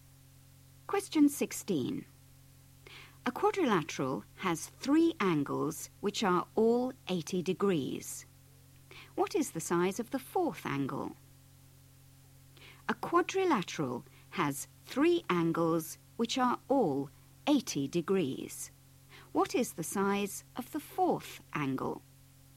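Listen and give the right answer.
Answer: 120 degrees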